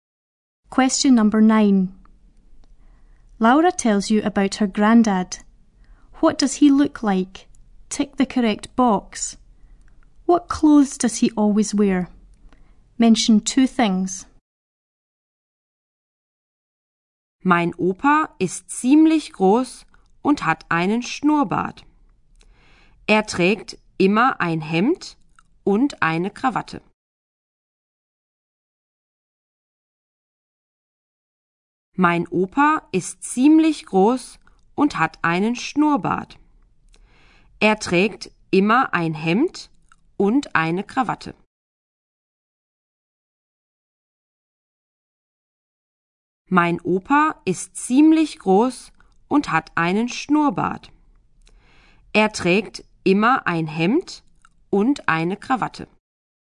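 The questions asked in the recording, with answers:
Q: What clothes does he always wear?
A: A shirt and a tie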